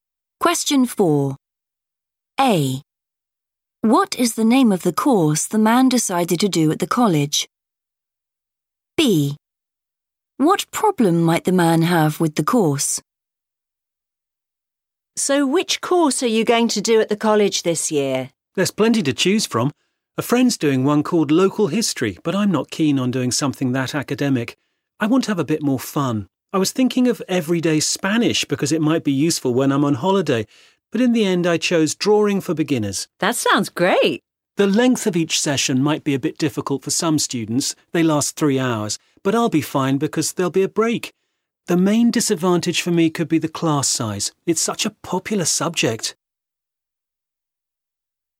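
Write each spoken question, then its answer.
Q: What is the name of the course the man decided to do at the college?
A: Drawing for Beginners

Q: What problem might the man have with the course?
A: the class size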